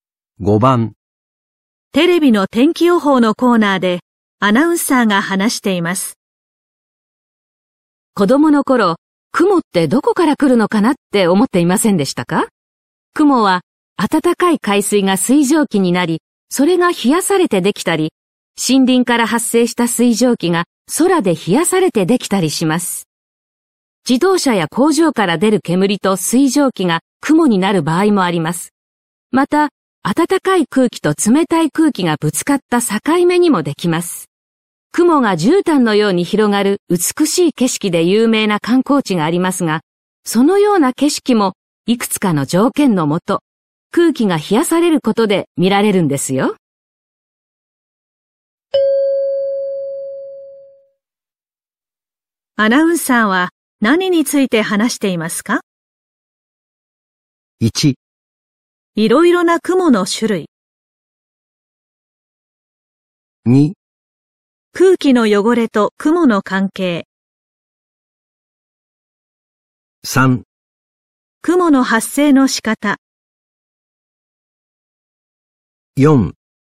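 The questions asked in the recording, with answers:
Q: アナウンサーは何について話していますか?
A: 3: 雲の発生の仕方。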